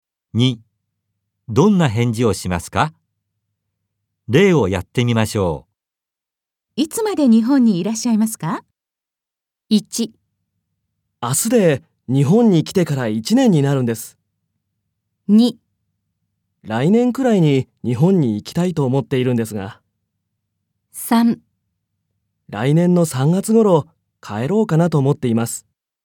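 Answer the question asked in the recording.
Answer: 3: 来年の3月頃帰ろうかなと思っています。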